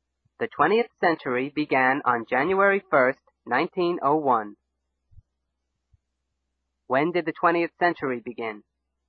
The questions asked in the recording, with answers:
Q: When did the 20th century begin?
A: On January 1, 1901. The 20th century began on January 1, 1901.